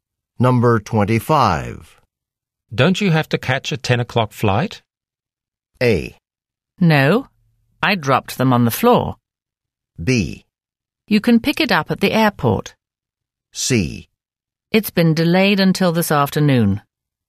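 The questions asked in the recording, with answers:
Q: Don't you have to catch a 10 o'clock flight?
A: C: It's been delayed until this afternoon.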